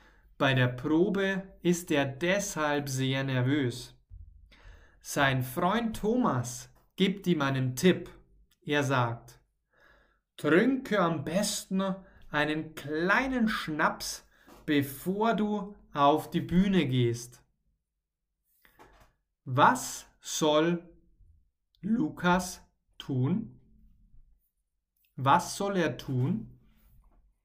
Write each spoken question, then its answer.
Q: Was soll Lukas tun? Was soll er tun?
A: Er soll einen kleinen Schnaps trinken.